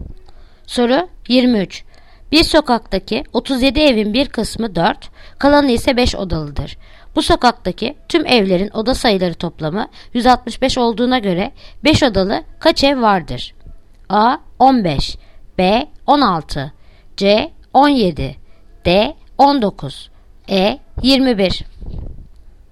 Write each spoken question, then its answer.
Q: Bu sokaktaki tüm evlerin oda sayıları toplamı 165 olduğuna göre 5 odalı kaç ev vardır?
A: Yanıt Ceyhan 17